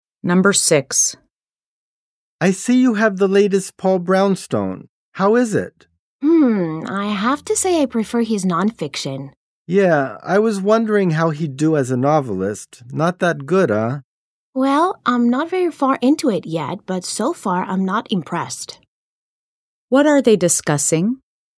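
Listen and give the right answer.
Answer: A new novel by Paul Brownstone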